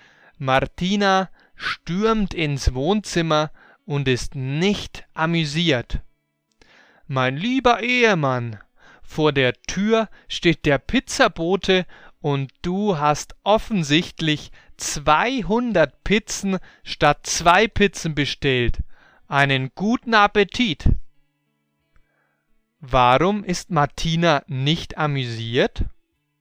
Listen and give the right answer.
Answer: Weil Alejandro zu viele Pizzen bestellt hat.